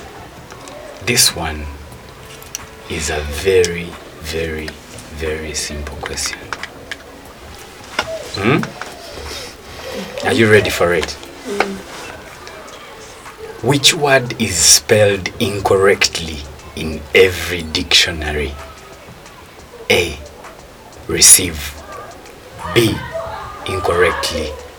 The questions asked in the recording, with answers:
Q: Which word is spelled incorrectly in every dictionary?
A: Incorrectly.